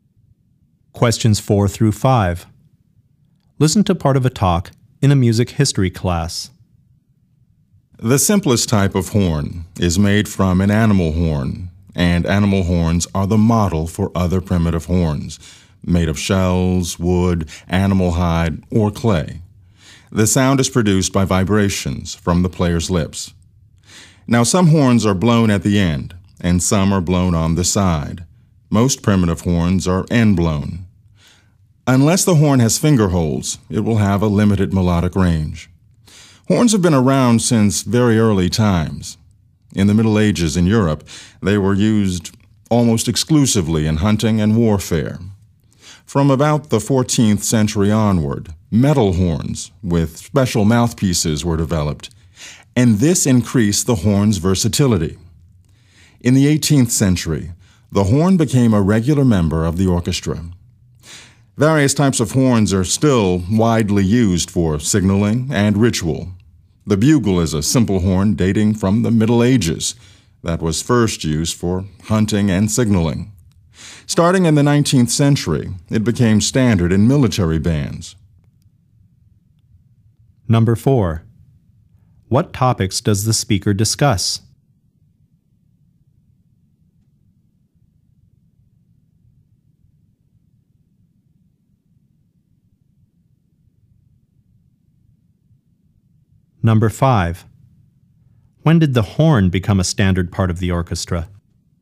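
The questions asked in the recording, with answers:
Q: When did the horn become a standard part of the orchestra?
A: In the 18th century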